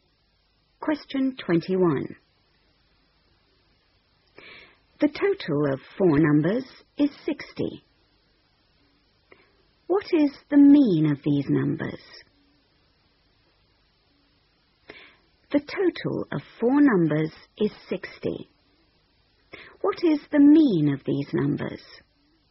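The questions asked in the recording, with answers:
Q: What is the mean of these numbers?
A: 15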